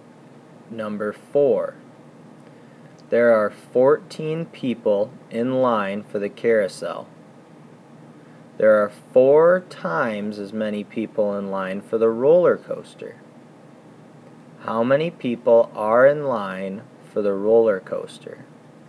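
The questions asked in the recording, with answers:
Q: How many people are in line for the roller coaster?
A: 56 people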